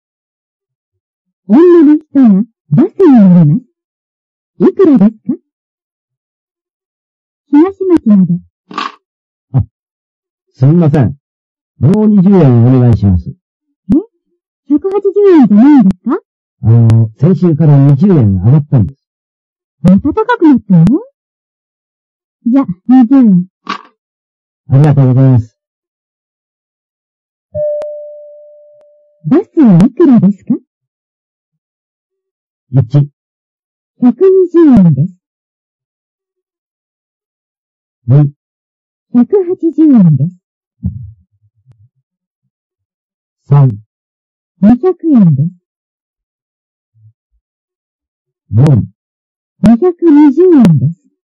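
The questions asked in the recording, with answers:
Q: バスはいくらですか?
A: 3: 200円です。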